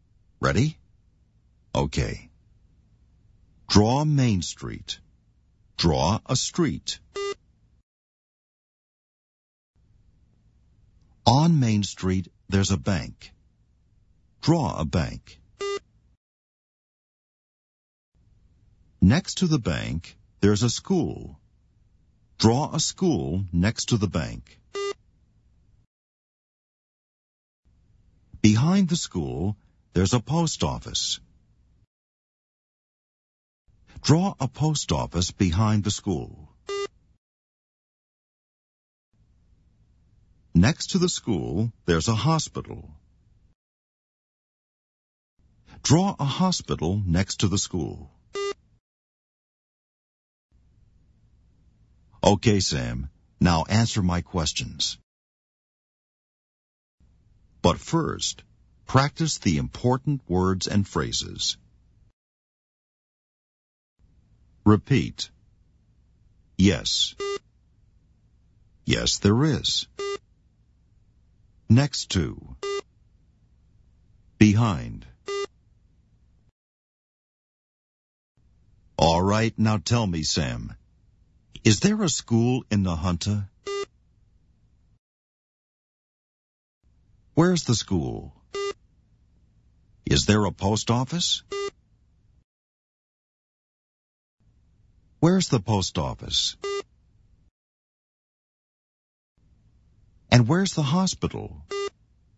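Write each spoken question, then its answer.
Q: Is there a school in Nahanta?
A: Yes, there is.

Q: Where's the school?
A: Next to the bank.

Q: Is there a post office?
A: Yes, there is.

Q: Where's the post office?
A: Behind the school.

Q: And where's the hospital?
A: Next to the school.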